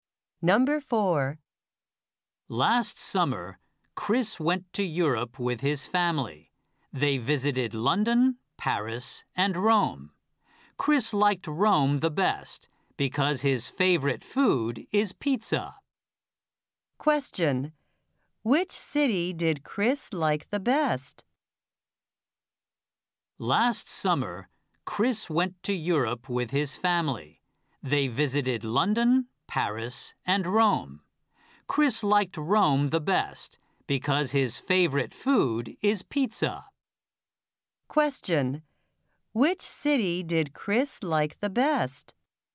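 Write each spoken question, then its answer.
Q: Which city did Chris like the best?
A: Rome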